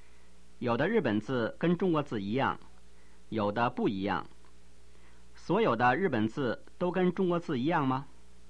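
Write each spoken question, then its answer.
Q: 所有的日本字都跟中国字一样吗?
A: 不是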